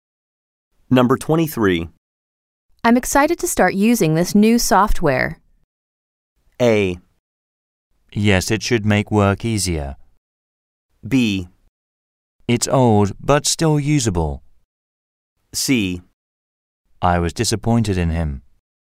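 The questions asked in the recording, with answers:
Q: I'm excited to start using this new software.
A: A: Yes, it should make work easier.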